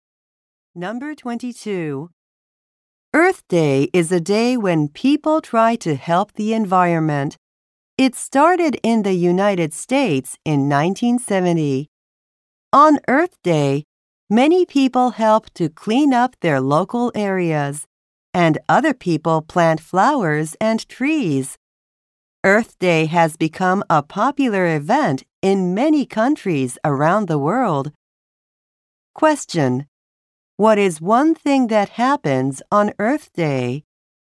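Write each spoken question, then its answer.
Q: What is one thing that happens on Earth Day?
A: Many people clean up their local areas.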